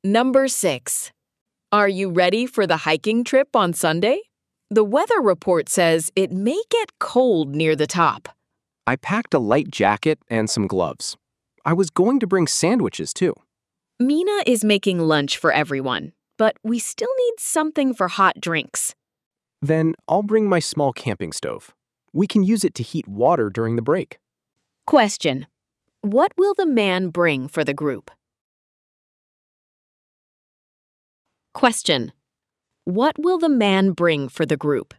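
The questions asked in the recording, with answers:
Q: what will the man bring for the group?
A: his small camping stove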